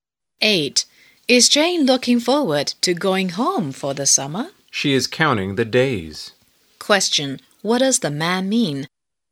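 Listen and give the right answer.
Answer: Jane is eager to go home.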